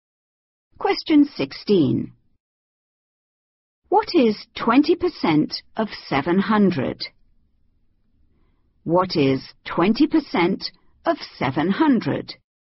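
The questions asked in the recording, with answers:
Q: What is 20% of 700?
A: 140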